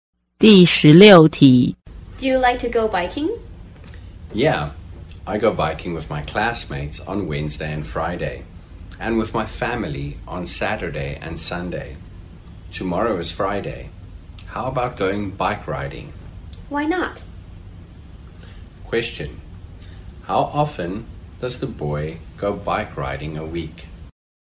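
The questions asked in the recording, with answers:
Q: Question. How often does the boy go bike riding a week?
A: Four times a week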